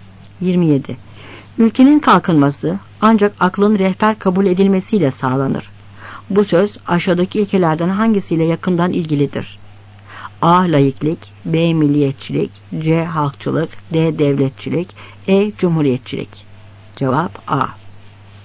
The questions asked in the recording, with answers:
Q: Bu söz aşağıdaki ilkelerden hangisiyle yakından ilgilidir?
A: Cevap A.